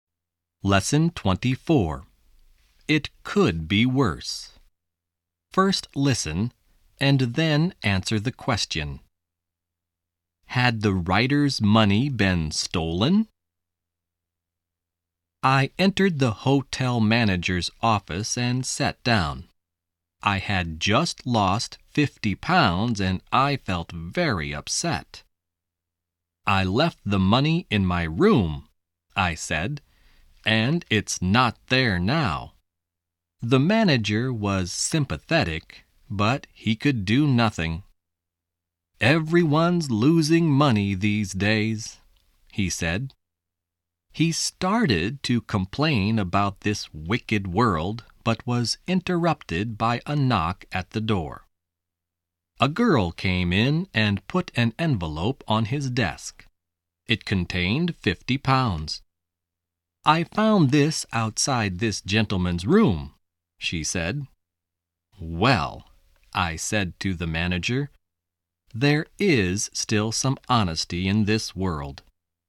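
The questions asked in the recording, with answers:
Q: Had the writer's money been stolen?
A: No, it hadn't. A girl found it outside his room.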